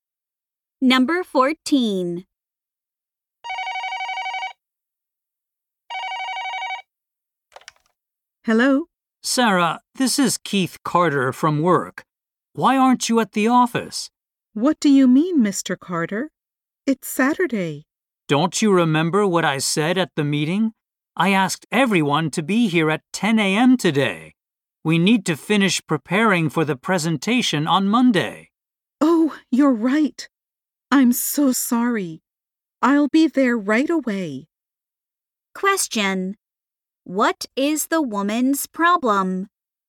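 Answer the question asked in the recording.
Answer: She forgot about going to the office on Saturday.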